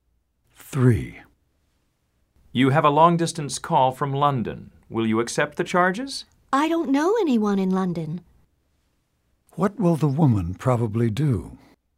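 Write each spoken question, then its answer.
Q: What will the woman probably do?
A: Refuse the call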